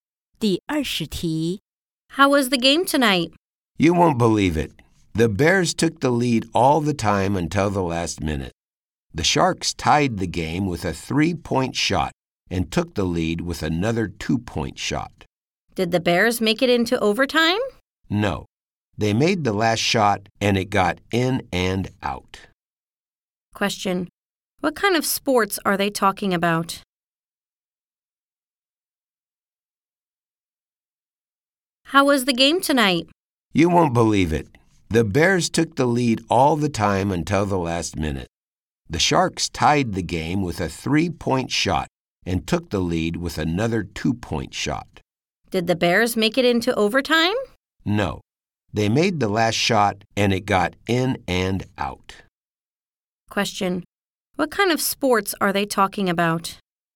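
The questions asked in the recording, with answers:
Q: What kind of sports are they talking about?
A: Basketball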